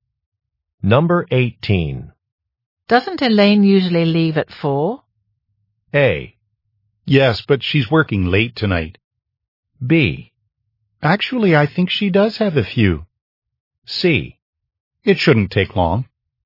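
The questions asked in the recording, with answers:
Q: Doesn't Elaine usually leave at 4?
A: A: Yes, but she's working late tonight.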